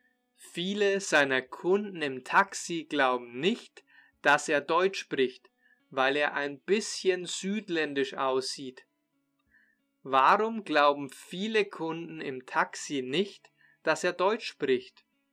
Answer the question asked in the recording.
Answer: Weil er ein bisschen südländisch aussieht.